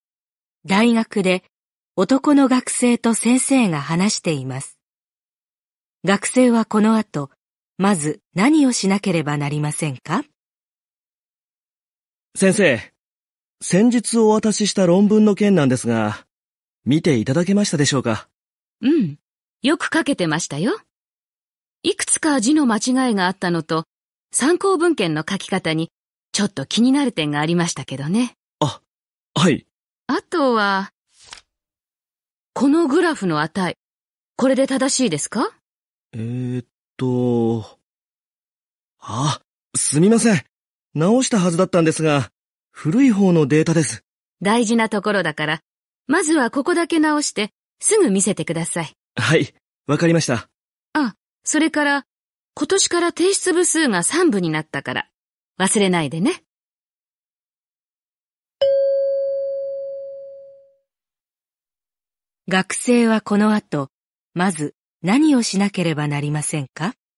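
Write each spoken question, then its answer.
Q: 学生はこの後、まず何をしなければなりませんか?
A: グラフの値(古いデータ)を直して先生に見せる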